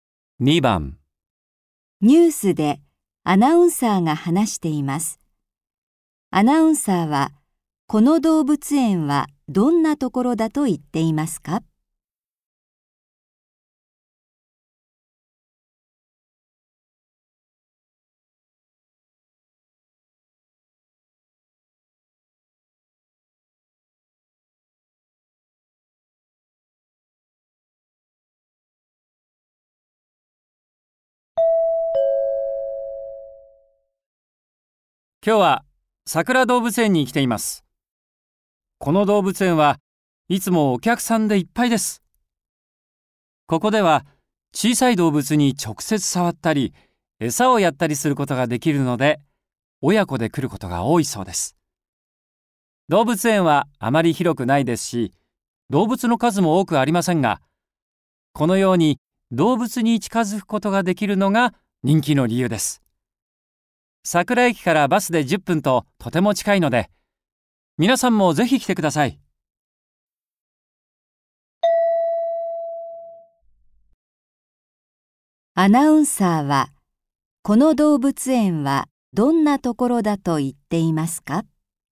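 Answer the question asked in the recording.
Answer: 動物に近づいて、直接触ったり餌をやったりできるところ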